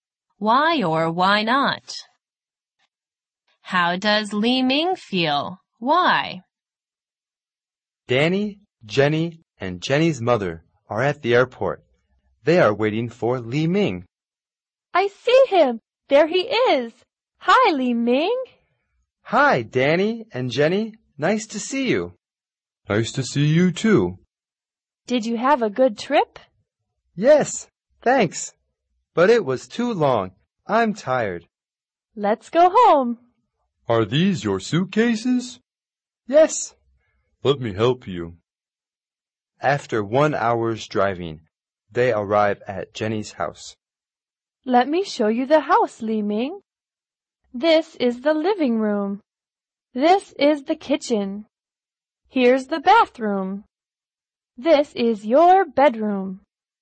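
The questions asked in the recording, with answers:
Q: How does Li Ming feel?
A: He feels tired.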